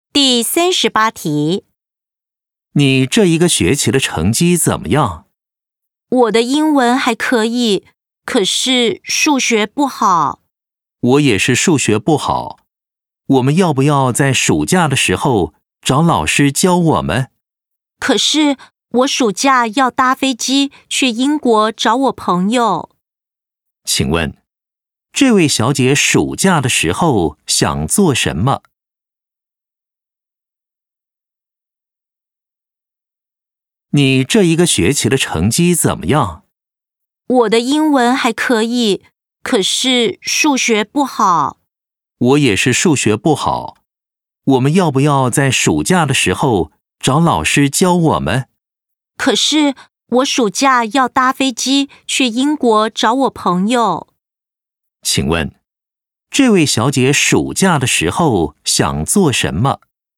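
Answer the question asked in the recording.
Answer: 搭飞机去英国找朋友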